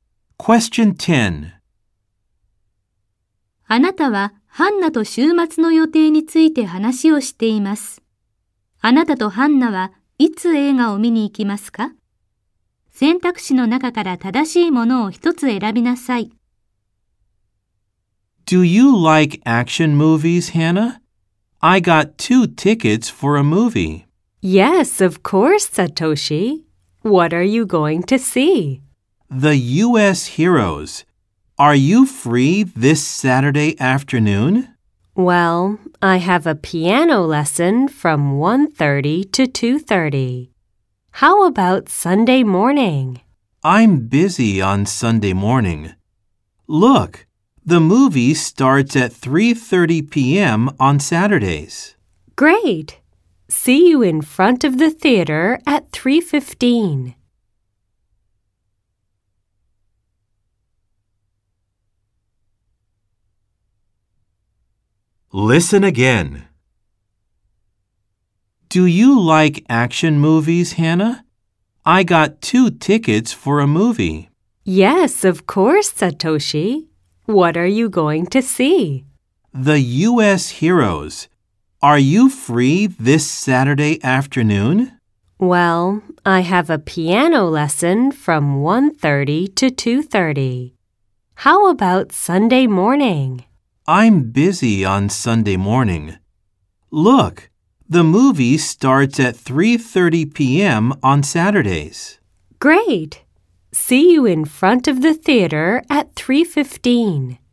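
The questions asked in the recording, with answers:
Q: あなたとハンナはいつ映画を見に行きますか?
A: 土曜日の午後3時30分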